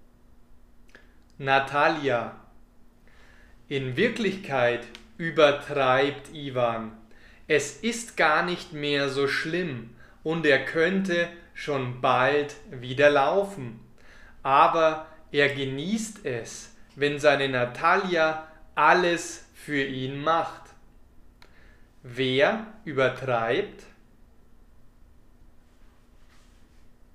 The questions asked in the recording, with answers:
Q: Wer übertreibt?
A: Ivan, er übertreibt.